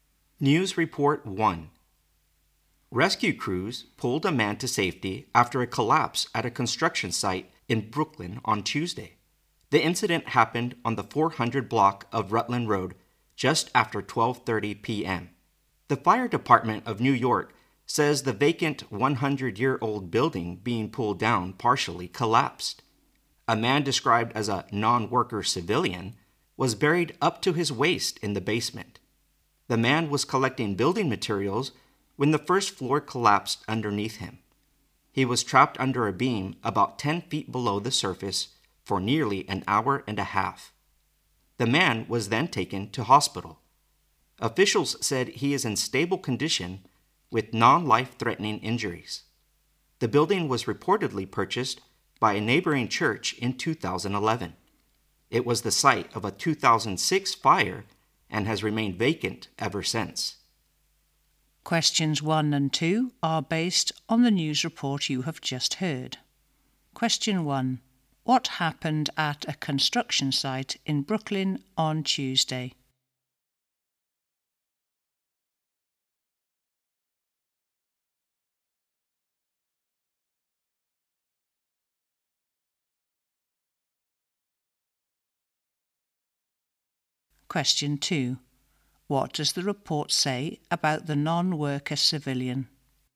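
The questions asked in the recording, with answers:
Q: What happened at a construction site in Brooklyn on Tuesday?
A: A vacant old building being pulled down partially collapsed and trapped a man.

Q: What does the report say about the non-worker civilian?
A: He was buried in the basement while collecting building materials; he is now in stable condition.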